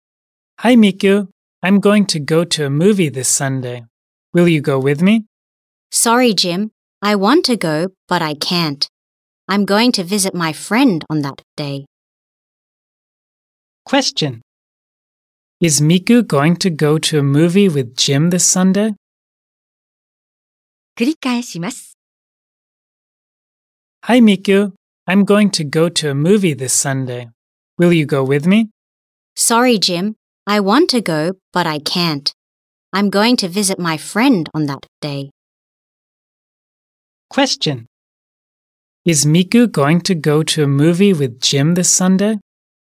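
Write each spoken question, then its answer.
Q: Is Miku going to go to a movie with Jim this Sunday?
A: No, she is going to visit her friend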